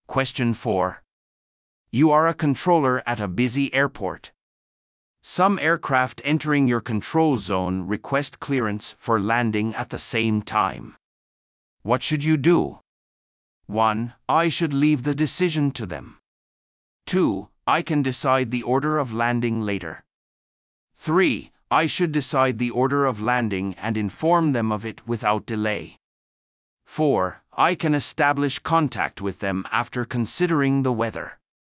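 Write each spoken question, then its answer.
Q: What should you do?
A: 3: I should decide the order of landing and inform them of it without delay.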